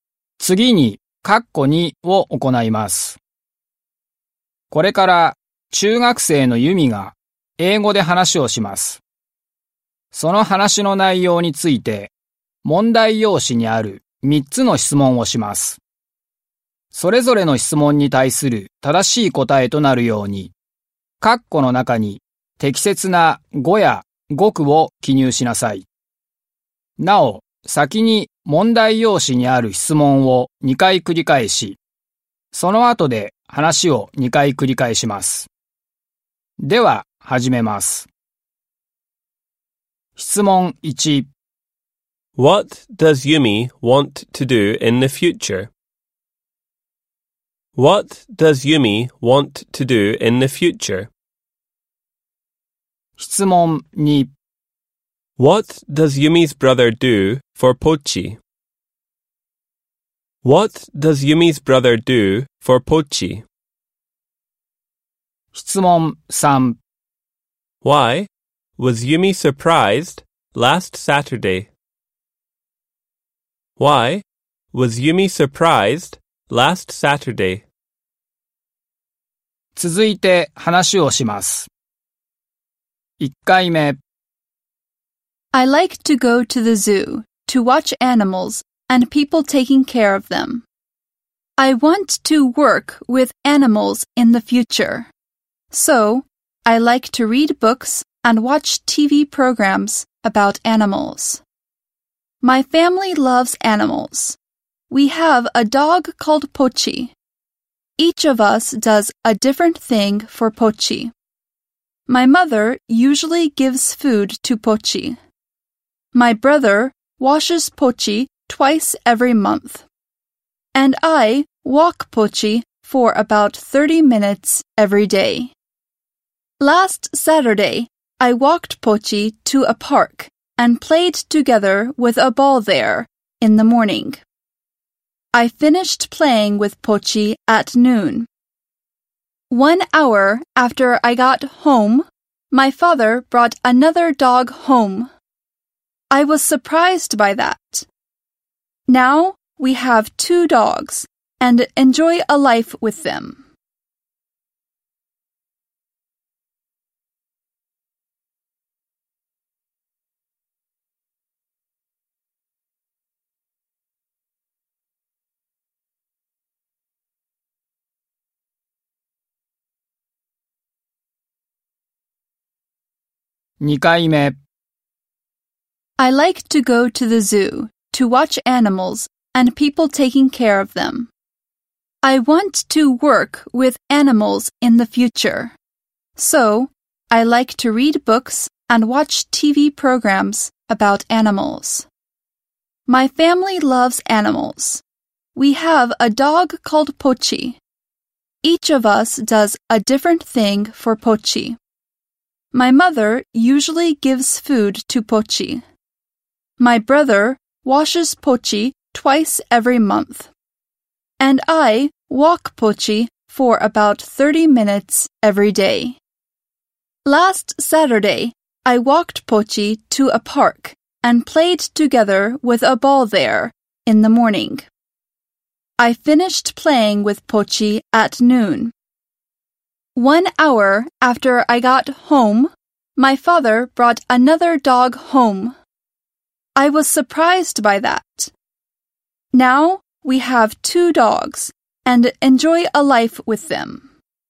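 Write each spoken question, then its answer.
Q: What does Yumi want to do in the future?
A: She wants to work with animals.

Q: What does Yumi's brother do for Pochi?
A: He washes Pochi twice every month.

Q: Why was Yumi surprised last Saturday?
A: Because her father brought another dog home.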